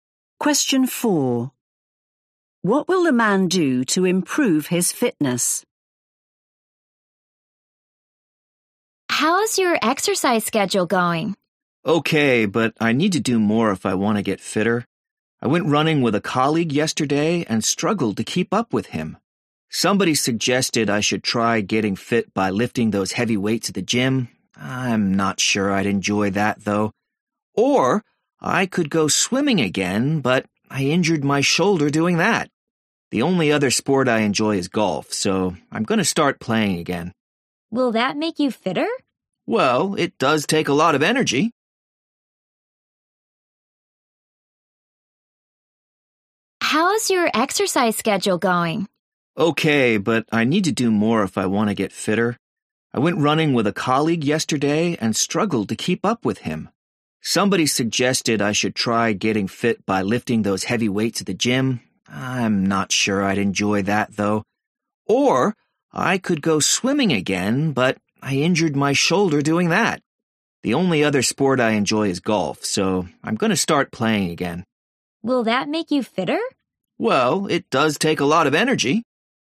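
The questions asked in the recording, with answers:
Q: What will the man do to improve his fitness?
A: start playing golf again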